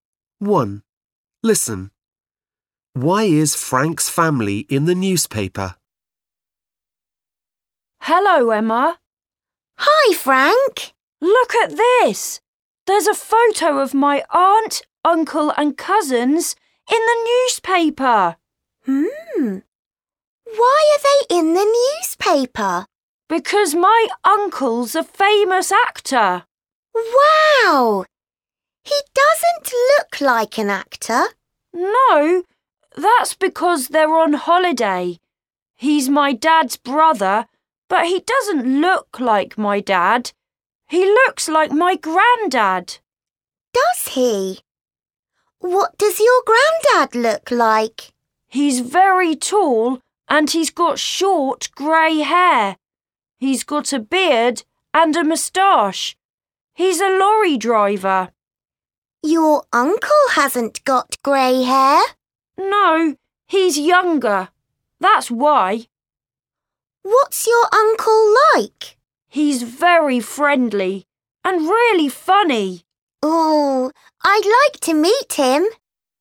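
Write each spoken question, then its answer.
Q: Why is Frank's family in the newspaper?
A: Because his uncle is a famous actor.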